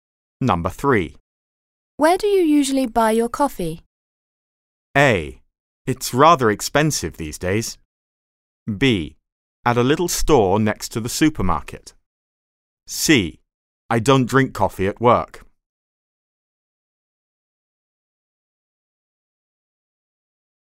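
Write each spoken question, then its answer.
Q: Where do you usually buy your coffee?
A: B: At a little store next to the supermarket.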